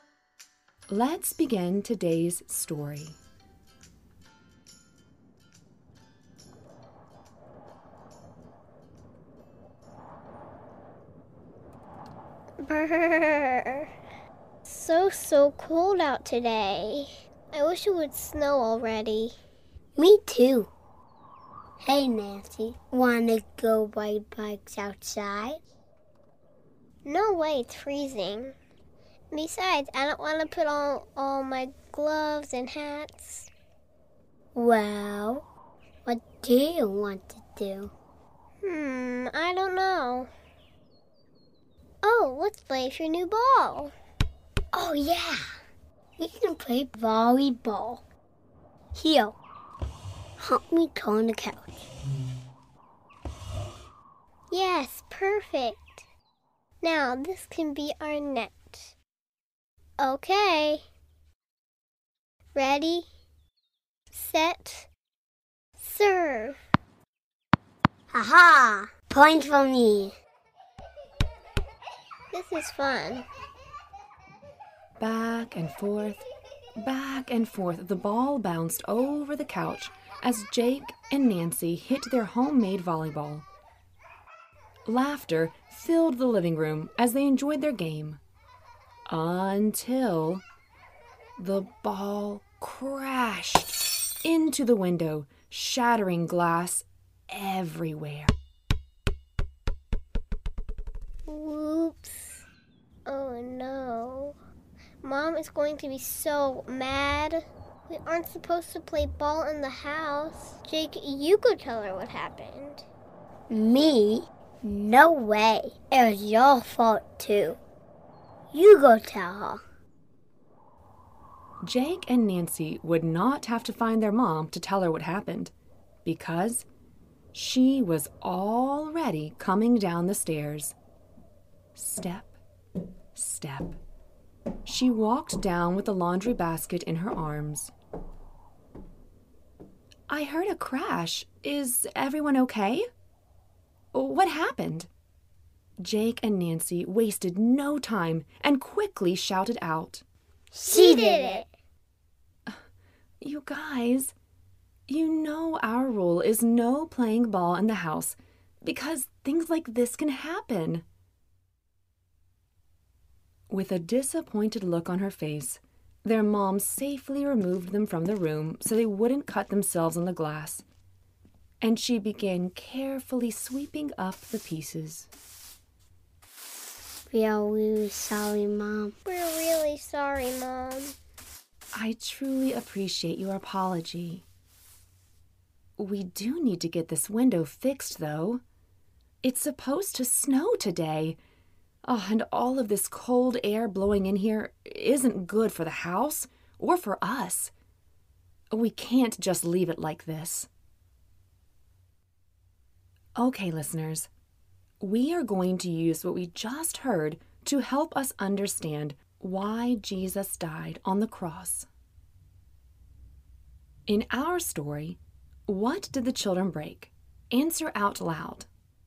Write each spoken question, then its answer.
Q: In our story, what did the children break?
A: A window.